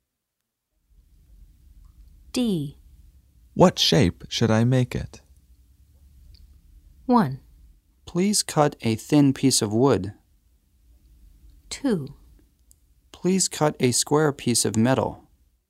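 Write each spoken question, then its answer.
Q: What shape should I make it?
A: 2: Please cut a square piece of metal.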